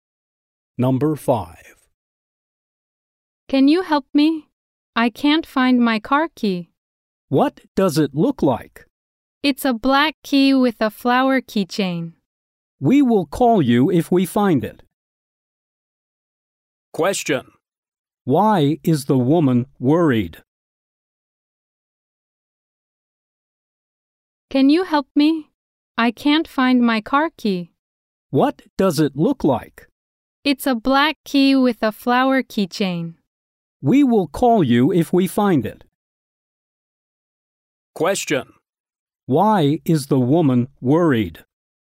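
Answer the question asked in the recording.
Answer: She can't find her car key.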